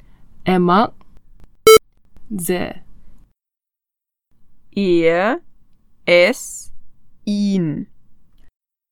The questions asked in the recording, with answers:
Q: Markus hat einen Hund. Er mag sehr. Er, es, ihn.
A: Markus hat einen Hund. Er mag ihn sehr.